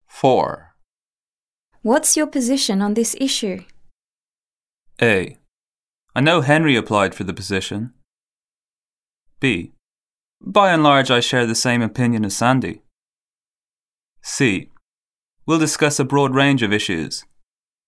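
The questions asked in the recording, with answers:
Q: What's your position on this issue?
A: B: By and large, I share the same opinion as Sandy.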